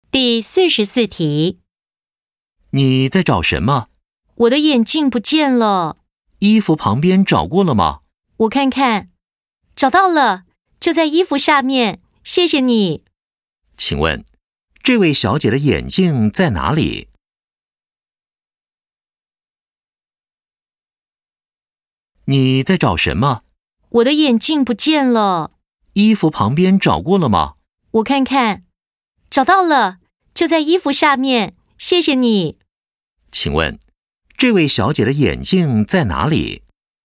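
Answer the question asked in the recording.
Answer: 在衣服下面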